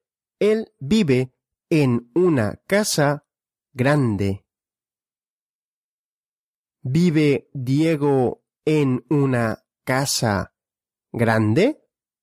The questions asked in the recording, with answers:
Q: ¿Vive Diego en una casa grande?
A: Sí, Diego vive en una casa grande.